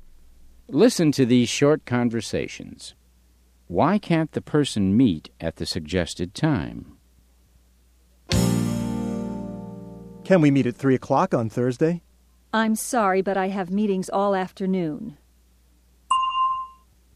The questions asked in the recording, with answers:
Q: Why can't the person meet at the suggested time?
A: She has meetings in the afternoon.